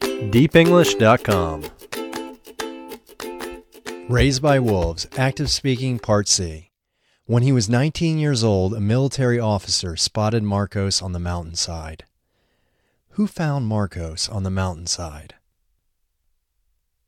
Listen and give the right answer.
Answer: A military officer found Marcos on the mountainside.